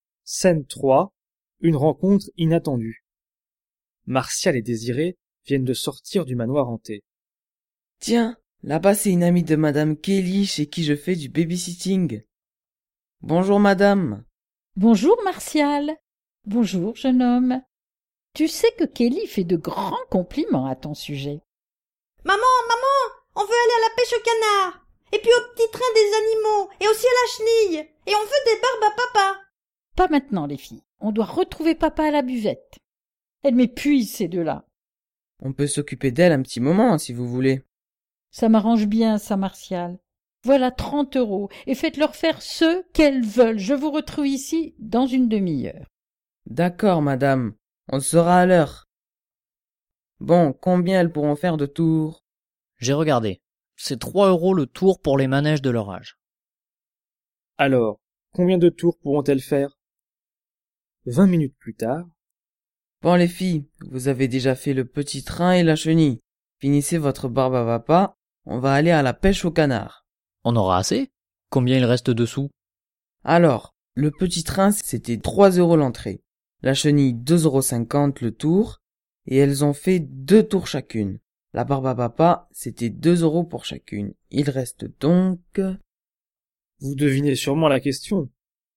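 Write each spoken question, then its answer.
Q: Alors, combien de tours pourront-elles faire?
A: 10 tours (30 € ÷ 3 €)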